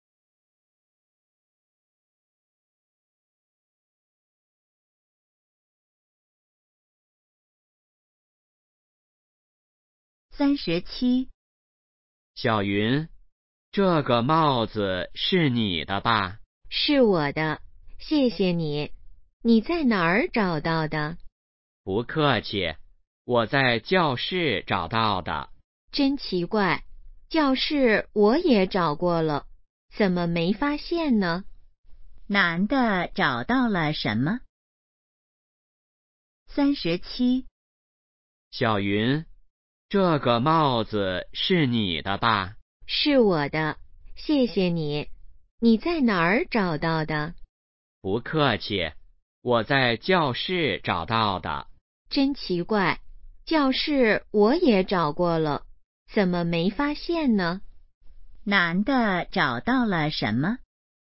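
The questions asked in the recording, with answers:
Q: 男的找到了什么?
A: 帽子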